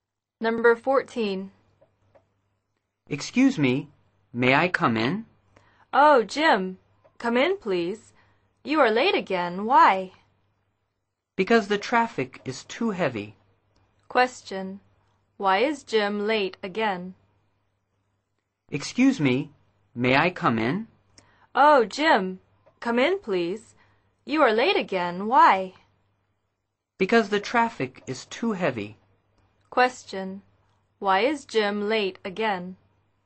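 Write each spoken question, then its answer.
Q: Question. Why is Jim late again?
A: The traffic is too heavy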